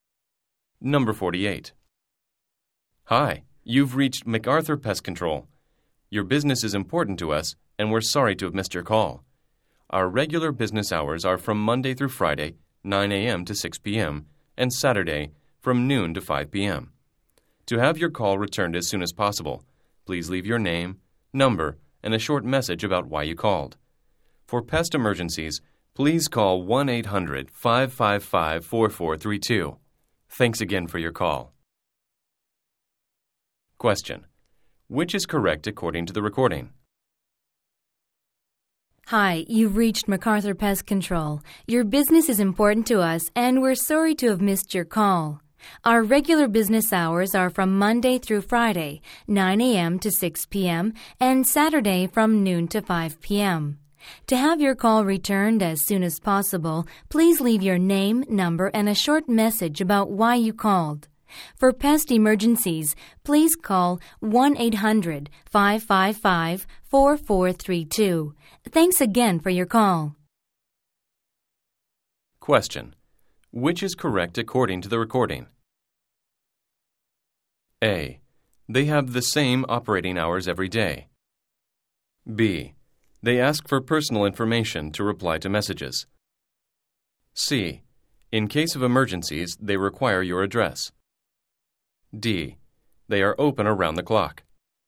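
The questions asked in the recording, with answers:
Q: Which is correct according to the recording?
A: B: They ask for personal information to reply to messages.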